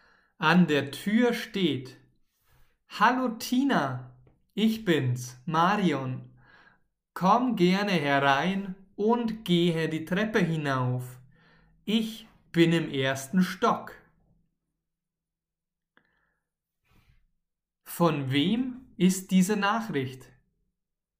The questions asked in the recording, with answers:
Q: Von wem ist diese Nachricht?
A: Von Marion. Diese Nachricht ist von Marion.